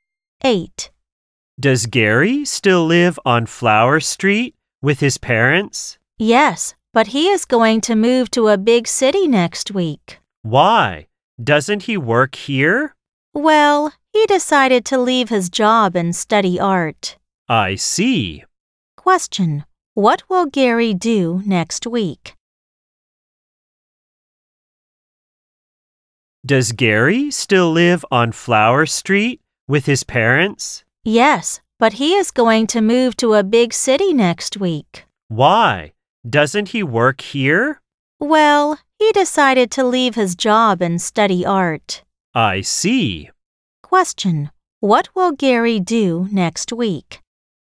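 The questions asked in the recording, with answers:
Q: what will Gary do next week?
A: Move to a big city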